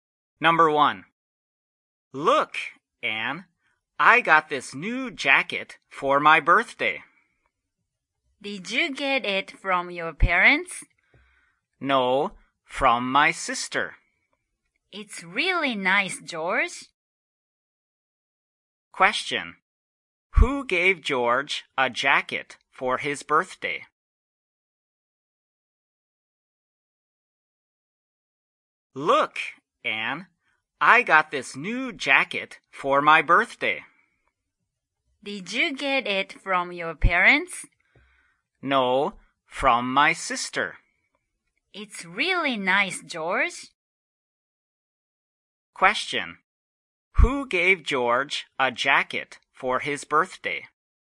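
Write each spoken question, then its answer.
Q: Who gave George a jacket for his birthday?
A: His sister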